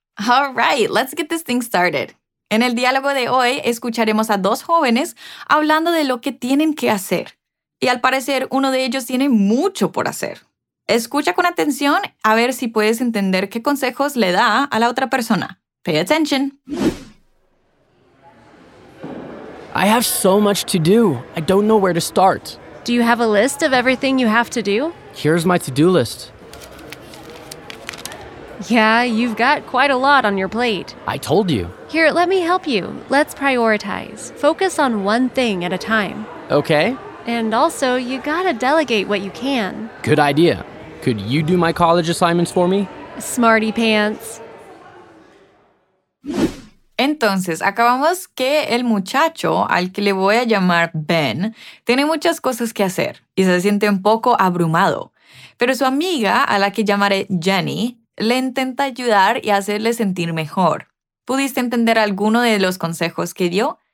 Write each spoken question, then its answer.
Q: ¿Pudiste entender alguno de los consejos que dio?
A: O sea, que hay que priorizar y enfocarse en una cosa a la vez.